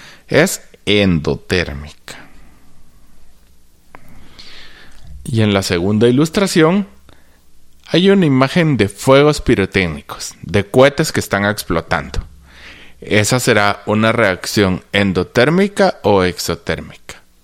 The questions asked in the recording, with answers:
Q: ¿Esa será una reacción endotérmica o exotérmica?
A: Muy bien, es exotérmica.